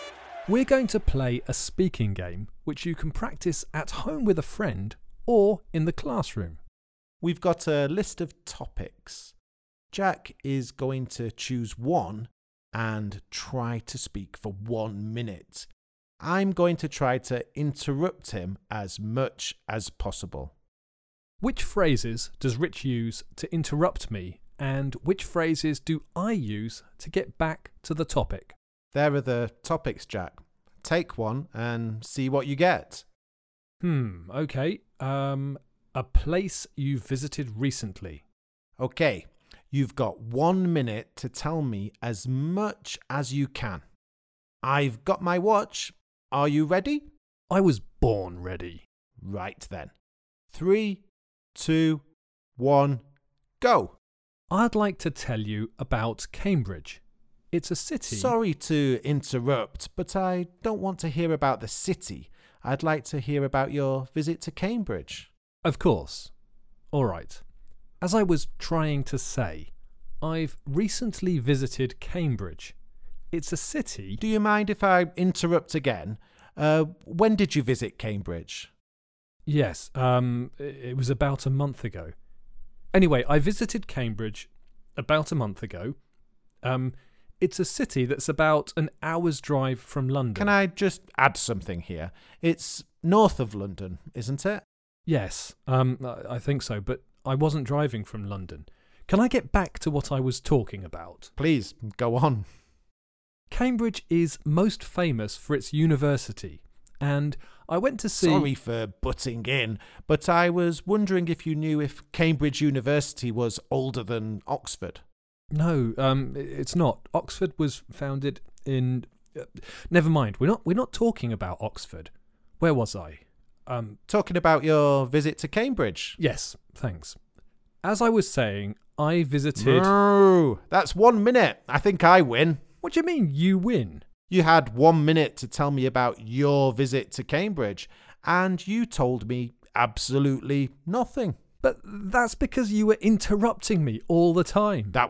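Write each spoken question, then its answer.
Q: Which phrases does Rich use to interrupt me, and which phrases do I use to get back to the topic?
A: Rich interrupts with: sorry to interrupt; do you mind if I interrupt again; can I just add something here; sorry for butting in. Jack gets back to the topic with: as I was trying to say; anyway; can I get back to what I was talking about; where was I; as I was saying.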